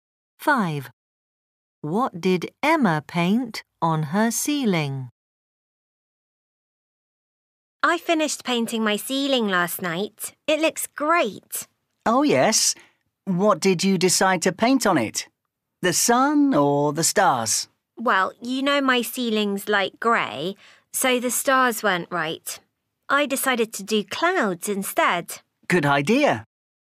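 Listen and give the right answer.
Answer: Clouds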